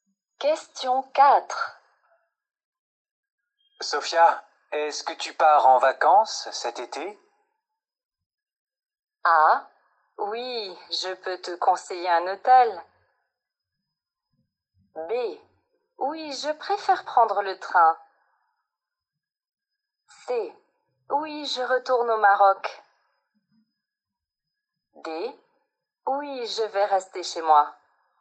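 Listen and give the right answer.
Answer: C: Oui, je retourne au Maroc.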